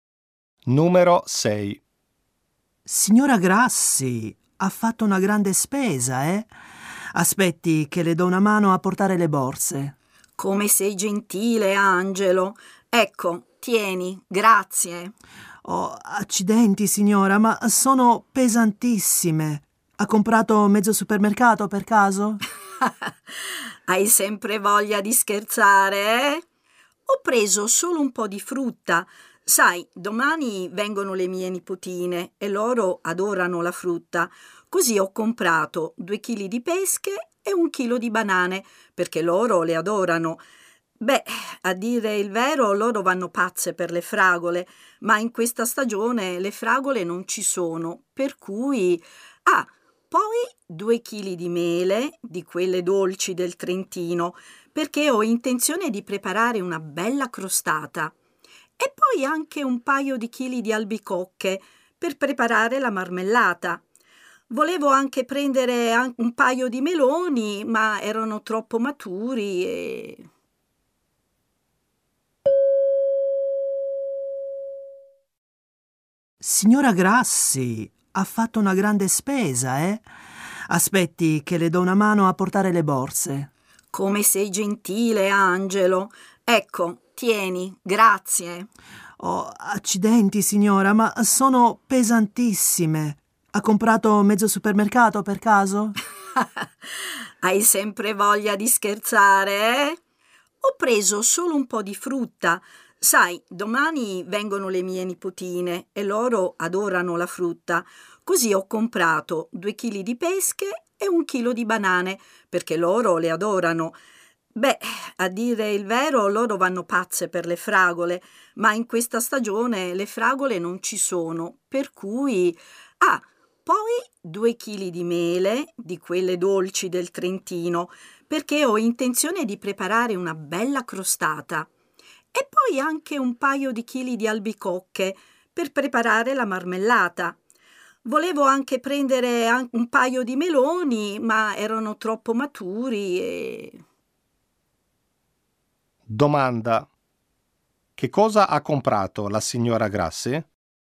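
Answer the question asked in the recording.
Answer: Frutta: pesche, banane, mele e albicocche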